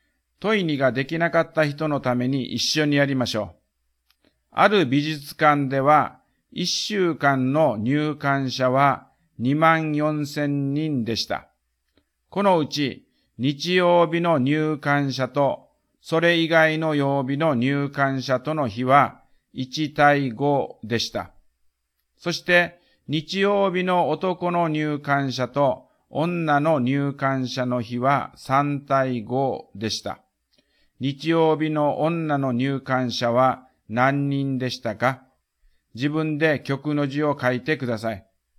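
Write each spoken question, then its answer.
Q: 日曜日の女の入館者は何人でしたか?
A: 2500人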